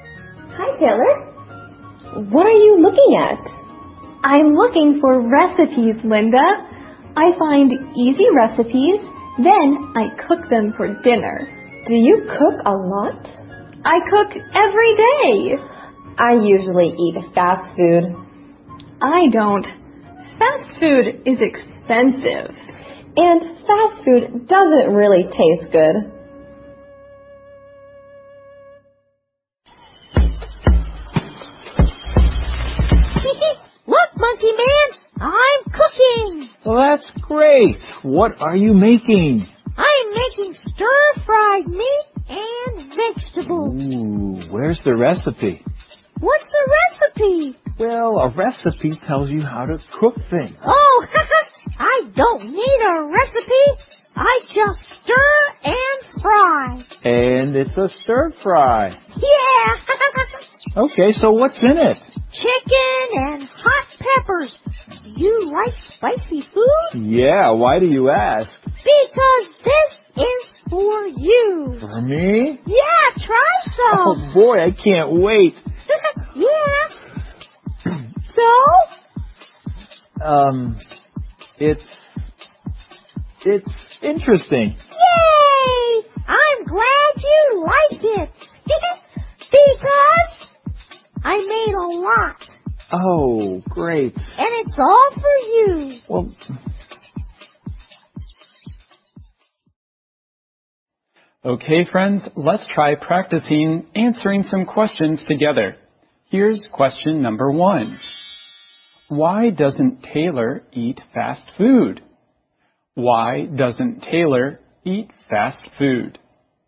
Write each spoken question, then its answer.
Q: Why doesn't Taylor eat fast food?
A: Because fast food is expensive.